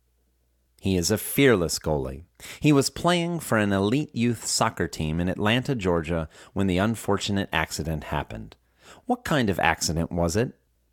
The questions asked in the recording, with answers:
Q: What kind of accident was it?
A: It was an unfortunate accident.